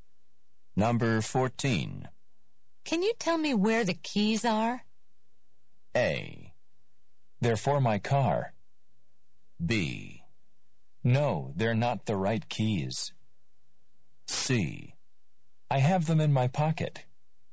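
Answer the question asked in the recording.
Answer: C: I have them in my pocket.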